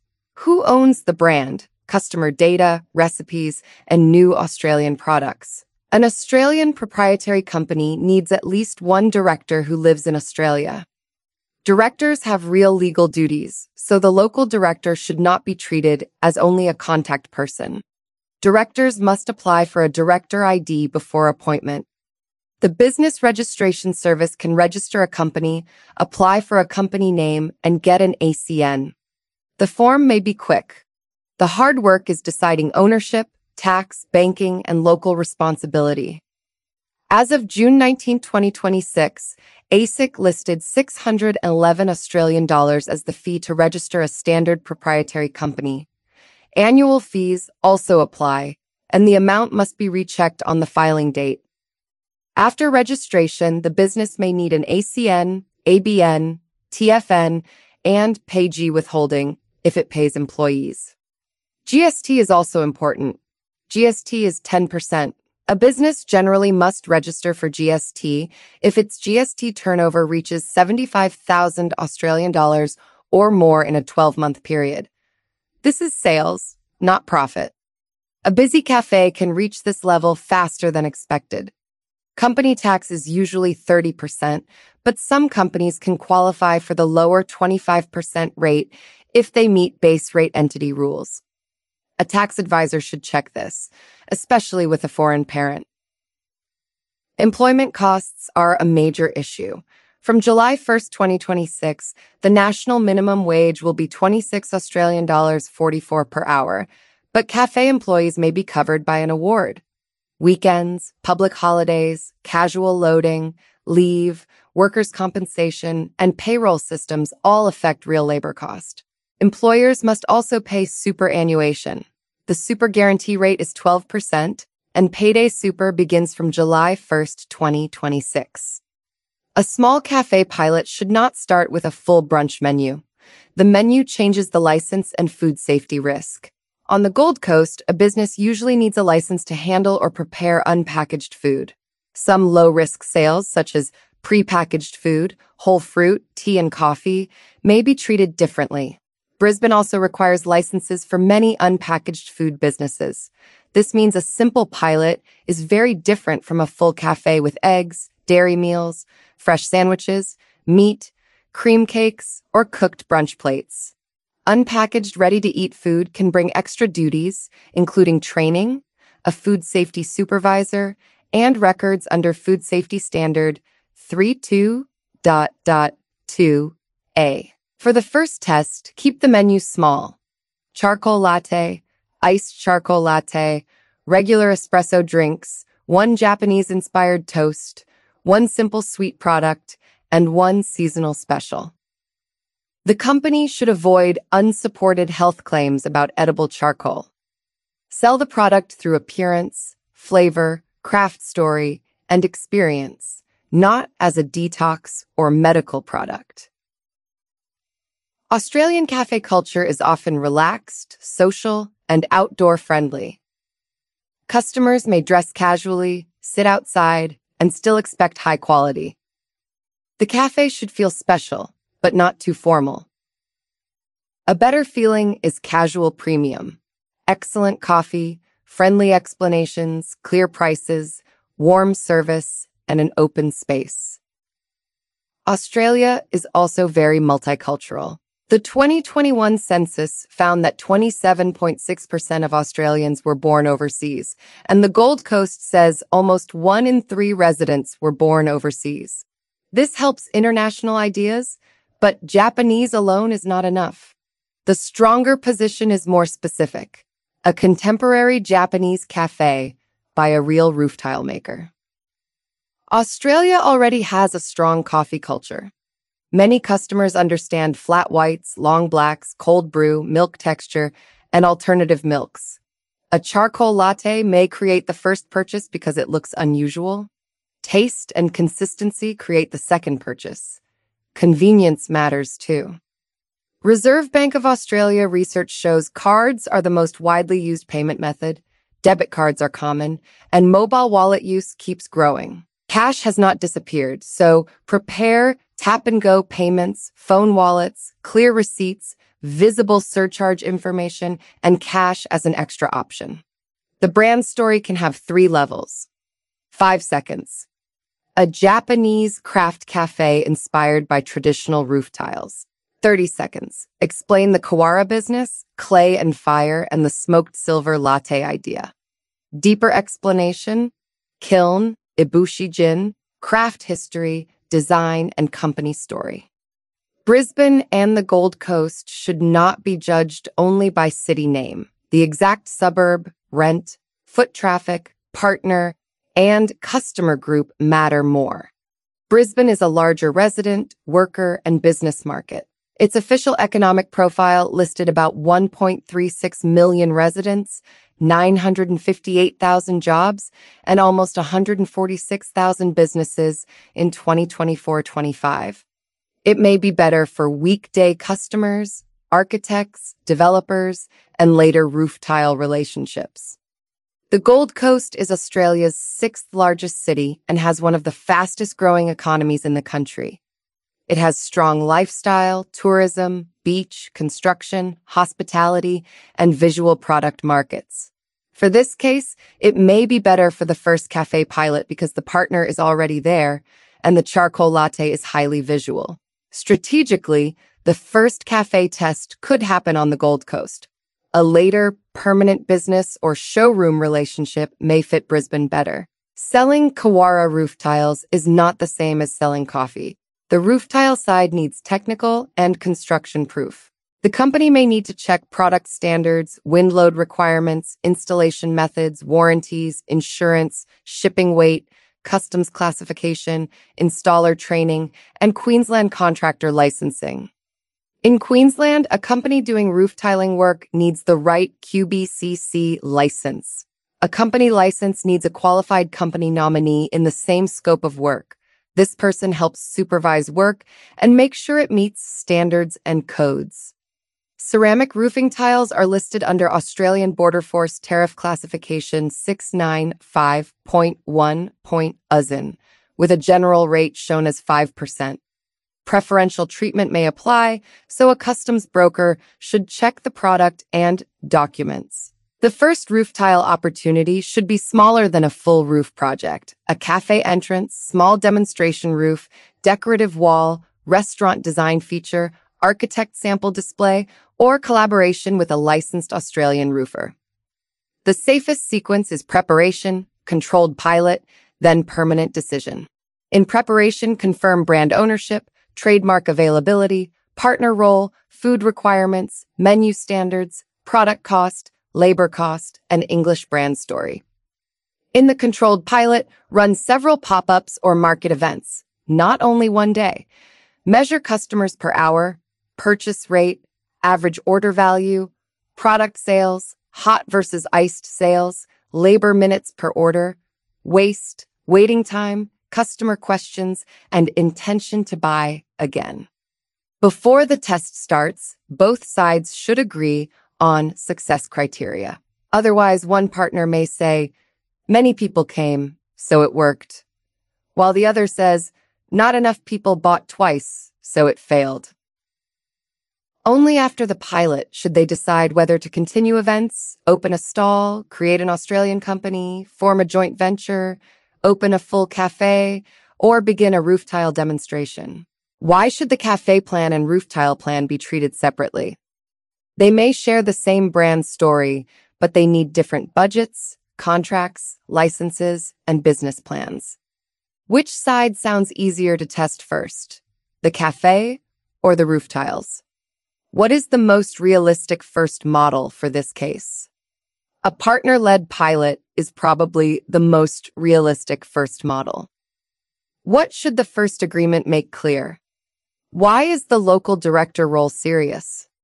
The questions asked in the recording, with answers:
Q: Why is the local director role serious?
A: The director has legal duties and responsibility for company compliance.